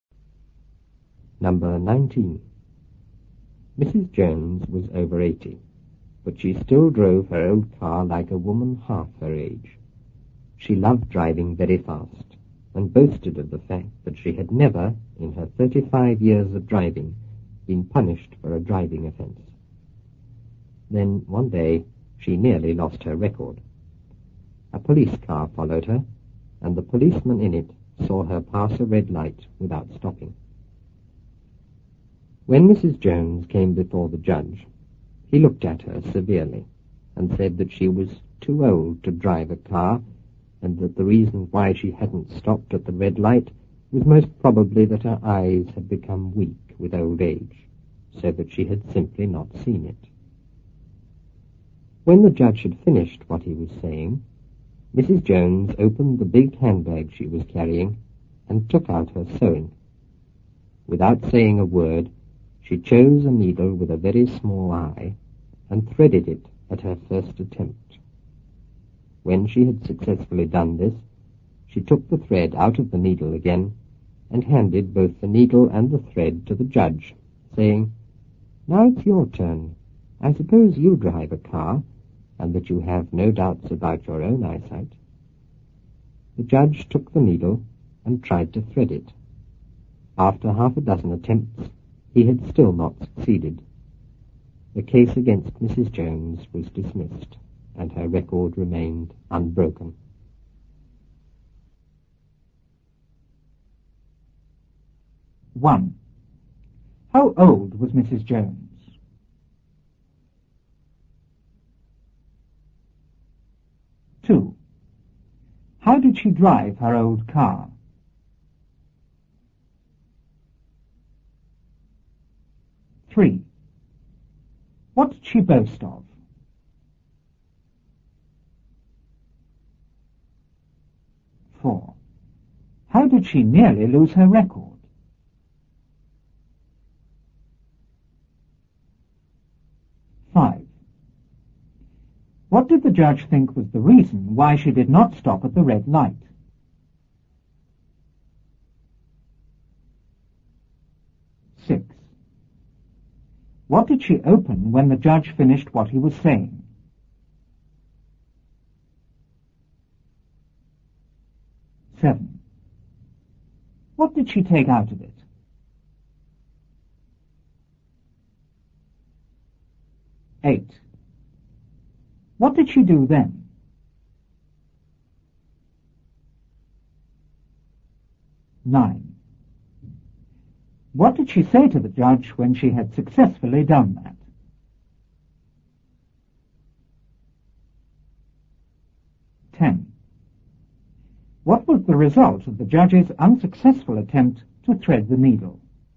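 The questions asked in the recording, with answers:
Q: How old was Mrs. Jones?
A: Over 80

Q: How did she drive her old car?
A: Very fast, like a woman half her age

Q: What did she boast of?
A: That she had never been punished for a driving offence in 35 years of driving

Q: How did she nearly lose her record?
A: A policeman saw her pass a red light without stopping

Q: What did the judge think was the reason why she did not stop at the red light?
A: Her eyes had become weak with old age, so she had not seen it

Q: What did she open when the judge finished what he was saying?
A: Her big handbag

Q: What did she take out of it?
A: Her sewing

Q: What did she do then?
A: She threaded a needle with a very small eye at her first attempt

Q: What did she say to the judge when she had successfully done that?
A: "Now it's your turn. I suppose you drive a car, and that you have no doubts about your own eyesight."

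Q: What was the result of the judge's unsuccessful attempt to thread the needle?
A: The case against her was dismissed and her record remained unbroken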